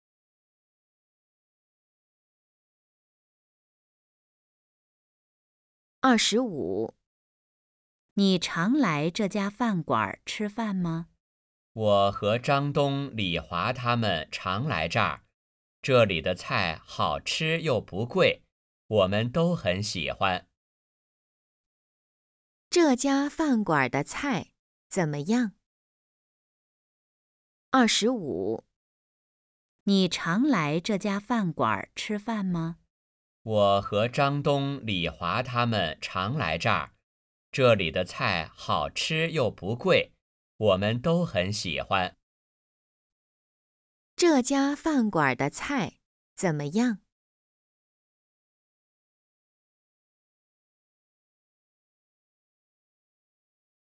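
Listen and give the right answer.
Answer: 好吃又不贵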